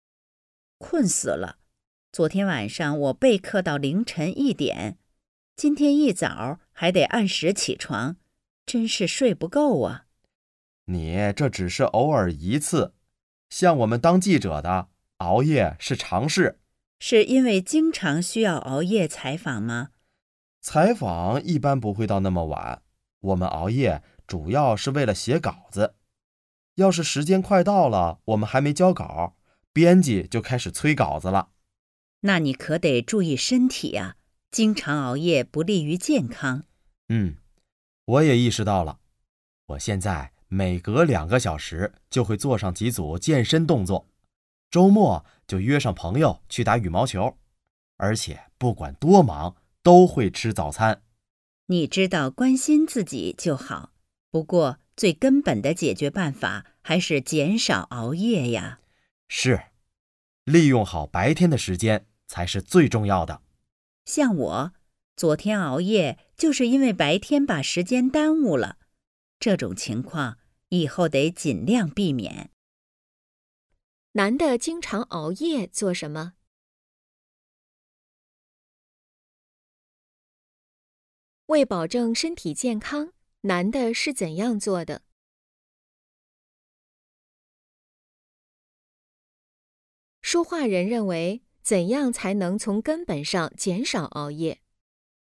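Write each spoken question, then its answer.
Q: 男的经常熬夜做什么?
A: 写稿子

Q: 为保证身体健康,男的是怎样做的?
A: 每隔2个小时做几组健身动作,周末和朋友打羽毛球,不管多忙都吃早餐

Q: 说话人认为,怎样才能从根本上减少熬夜?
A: 利用好白天的时间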